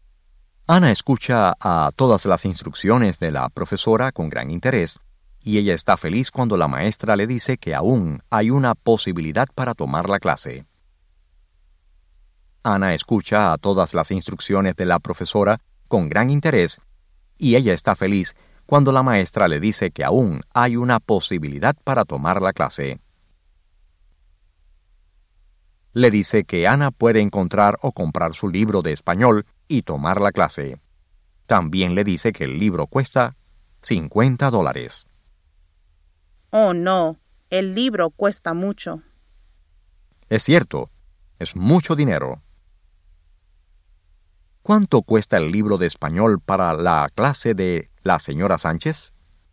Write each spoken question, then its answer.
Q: ¿Cuánto cuesta el libro de español para la clase de la señora Sánchez?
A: El libro cuesta $50.